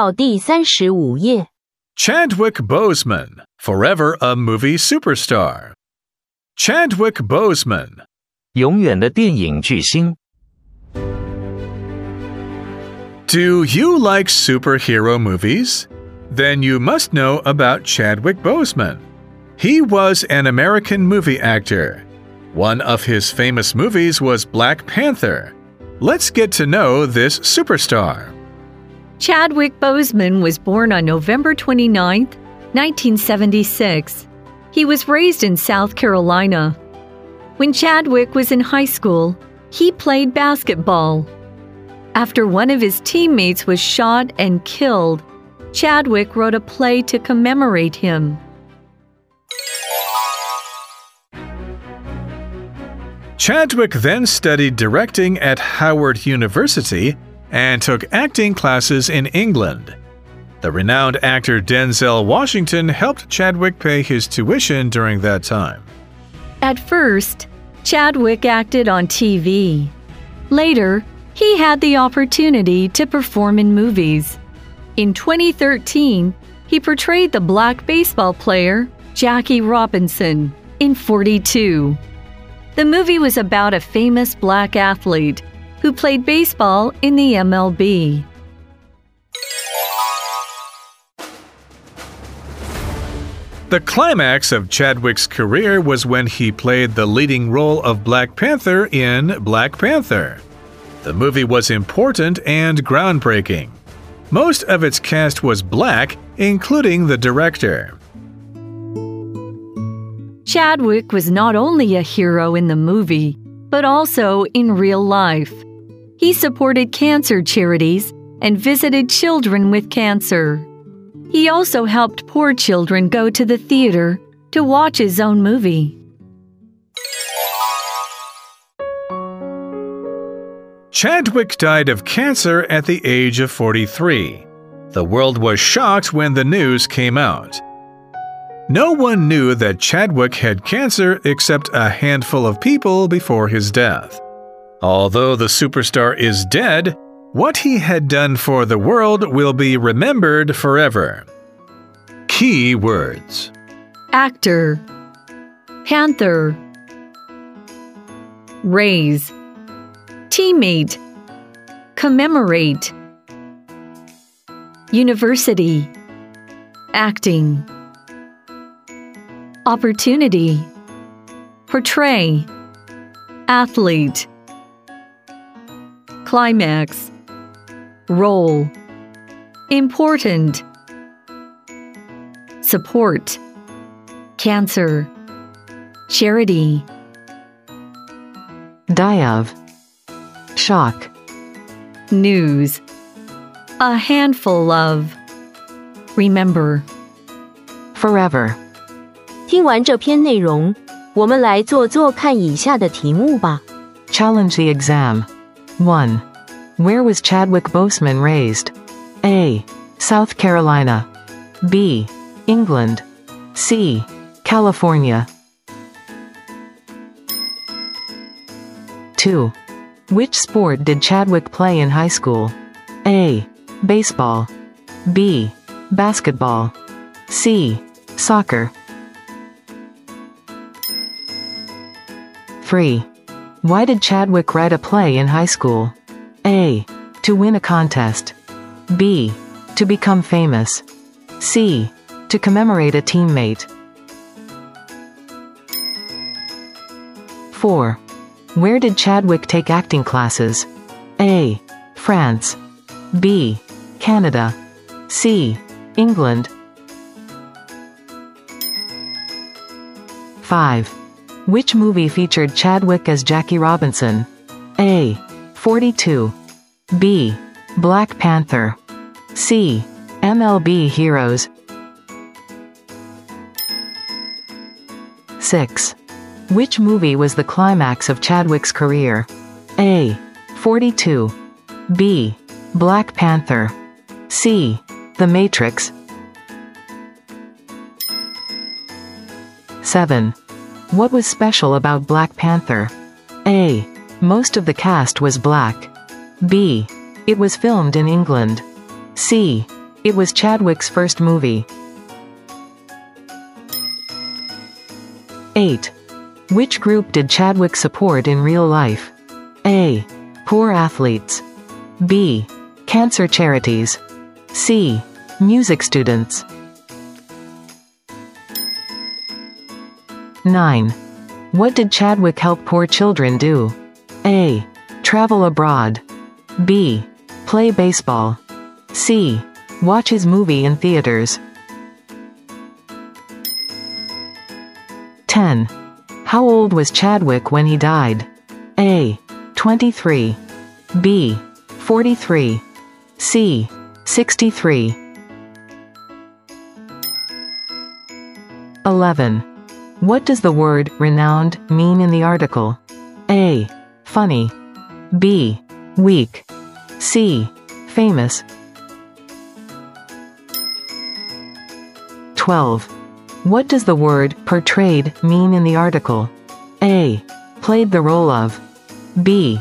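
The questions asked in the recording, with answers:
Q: Where was Chadwick Boseman raised?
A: A: South Carolina

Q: Which sport did Chadwick play in high school?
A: B: Basketball

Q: Why did Chadwick write a play in high school?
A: C: To commemorate a teammate

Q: Where did Chadwick take acting classes?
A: C: England

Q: Which movie featured Chadwick as Jackie Robinson?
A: A: 42

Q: Which movie was the climax of Chadwick's career?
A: B: Black Panther

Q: What was special about Black Panther?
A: A: Most of the cast was black

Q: Which group did Chadwick support in real life?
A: B: Cancer Charities

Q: What did Chadwick help poor children do?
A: C: Watch his movie in theaters

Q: How old was Chadwick when he died?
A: B: 43

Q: What does the word renowned mean in the article?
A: C: Famous

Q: What does the word portrayed mean in the article?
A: A: Played the role of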